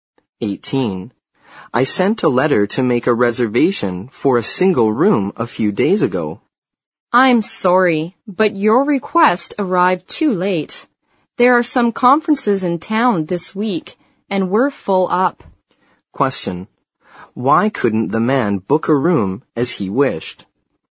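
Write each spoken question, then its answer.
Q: Why couldn't the man book a room as he wished?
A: His request arrived too late and the hotel was full because of conferences in town.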